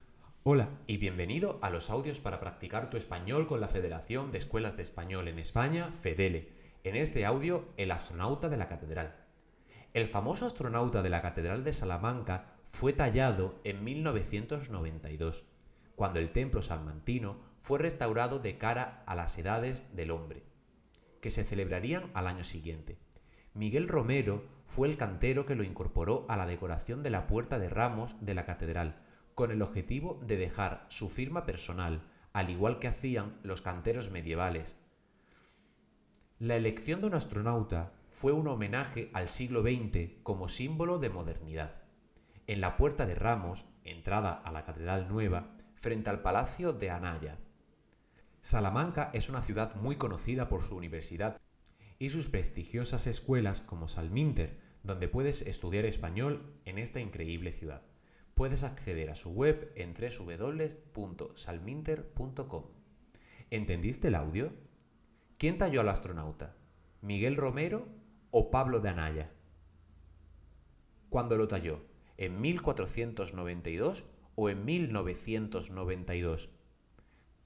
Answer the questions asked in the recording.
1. fue Miguel Romero
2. en 1992